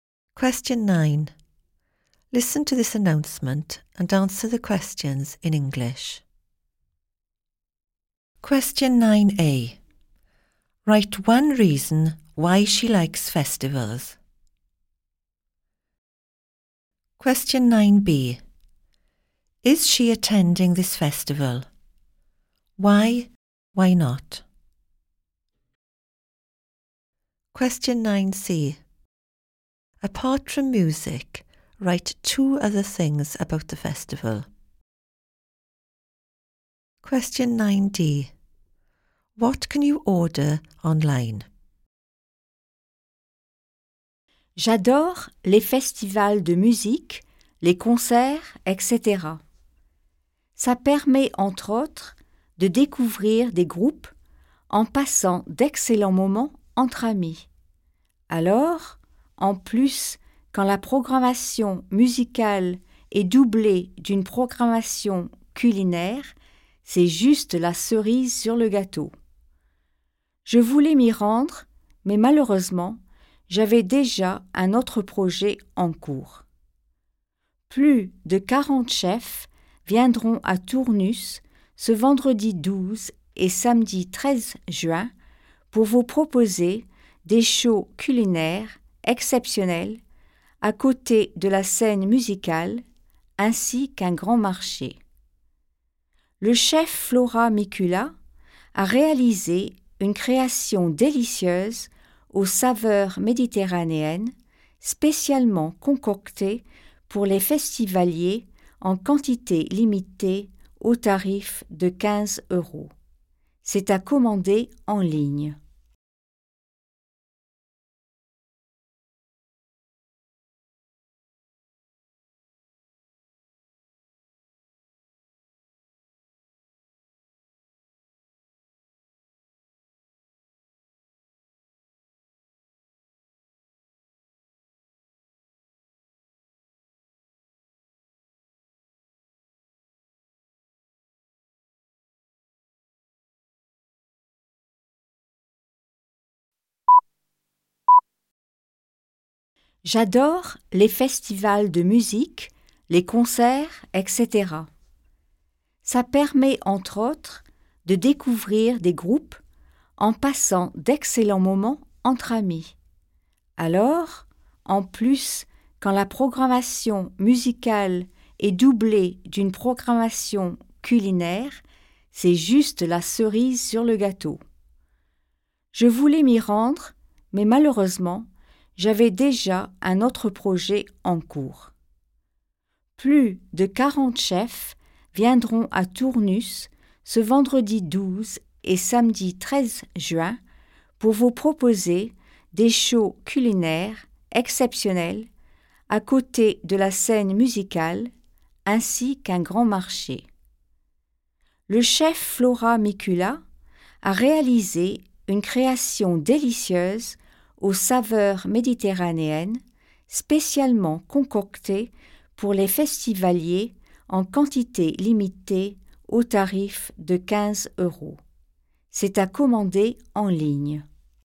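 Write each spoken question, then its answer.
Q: Write one reason why she likes festivals.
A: Discovering bands / good times with friends

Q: Is she attending this festival?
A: No, she already had another plan

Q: Apart from music, write two other things about the festival.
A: Cooking shows by over 40 chefs; a big market

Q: What can you order online?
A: Chef Flora Mikula's Mediterranean dish (15 euros)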